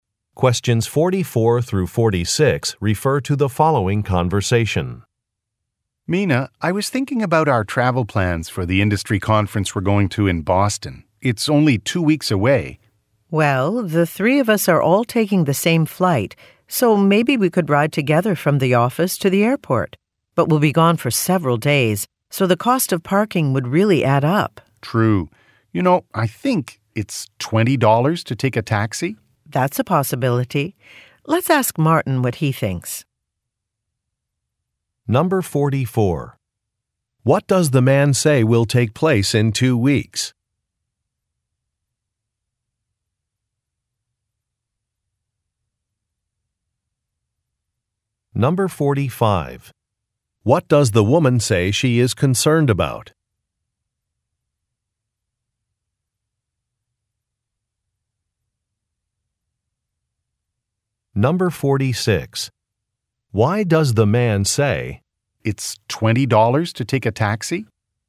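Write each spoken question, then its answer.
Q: What does the man say will take place in 2 weeks?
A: An industry conference in Boston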